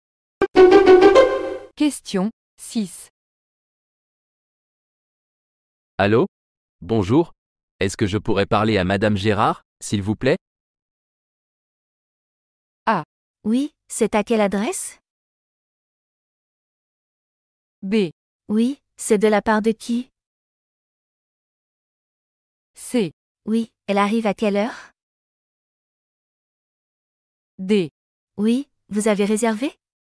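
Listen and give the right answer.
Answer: B: Oui, c'est de la part de qui?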